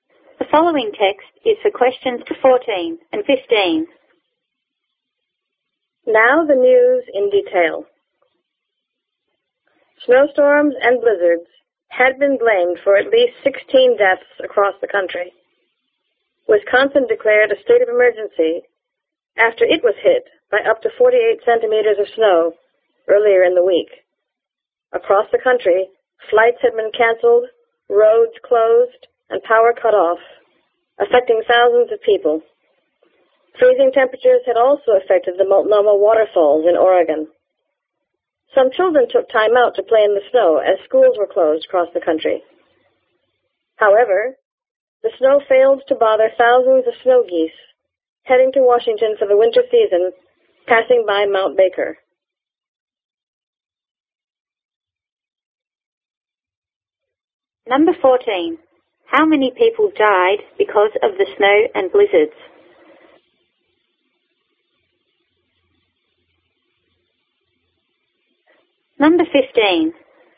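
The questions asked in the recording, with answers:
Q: How many people died because of the snow and blizzards?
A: At least 16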